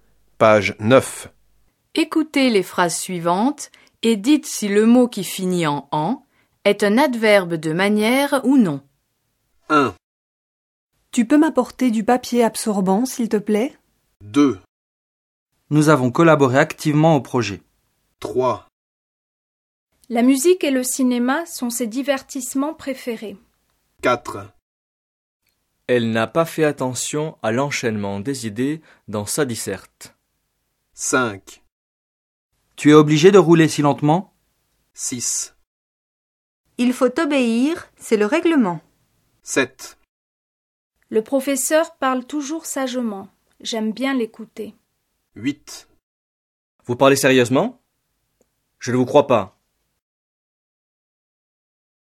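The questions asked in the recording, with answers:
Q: Tu peux m'apporter du papier absorbant, s'il te plaît ?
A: Non (absorbant n'est pas un adverbe)

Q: Nous avons collaboré activement au projet.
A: Oui (activement)

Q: La musique et le cinéma sont ses divertissements préférés.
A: Non (divertissements est un nom)

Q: Elle n'a pas fait attention à l'enchaînement des idées dans sa disserte.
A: Non (enchaînement est un nom)

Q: Tu es obligé de rouler si lentement ?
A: Oui (lentement)

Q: Il faut obéir, c'est le règlement.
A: Non (règlement est un nom)

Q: Le professeur parle toujours sagement.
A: Oui (sagement)

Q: Vous parlez sérieusement ? Je ne vous crois pas.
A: Oui (sérieusement)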